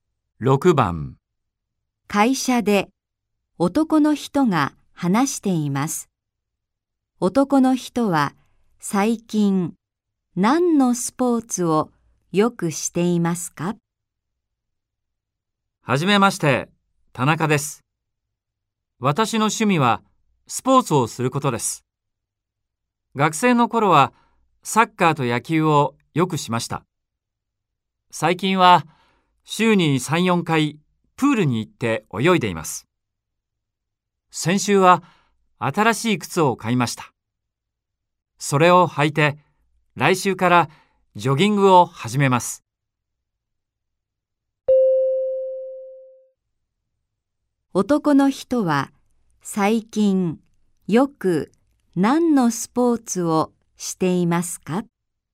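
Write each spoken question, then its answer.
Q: 男の人は最近よく何のスポーツをしていますか?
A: 水泳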